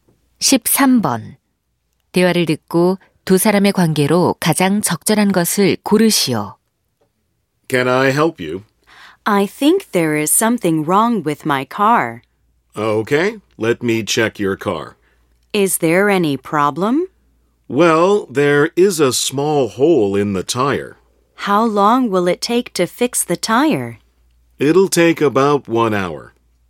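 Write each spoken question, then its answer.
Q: 대화를 듣고 두 사람의 관계로 가장 적절한 것을 고르시오.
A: 정비사 - 손님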